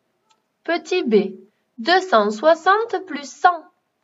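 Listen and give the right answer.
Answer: 360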